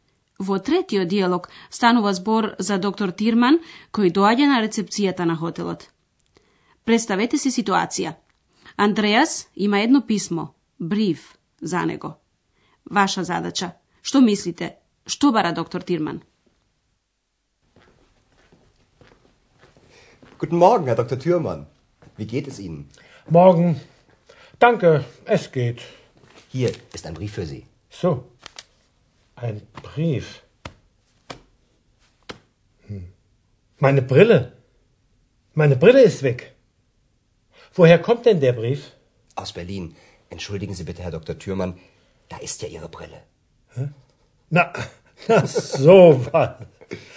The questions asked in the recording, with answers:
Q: Што бара доктор Тирман?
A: Тој ги бара, но не ги наоѓа и поради тоа вели, ми ги нема очилата.